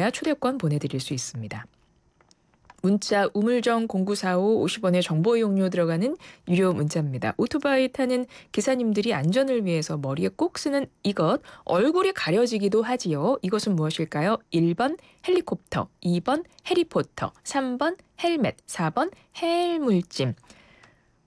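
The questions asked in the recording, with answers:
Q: 이것은 무엇일까요? 1번 헬리콥터, 2번 해리포터, 3번 헬멧, 4번 해물짐.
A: 3: 헬멧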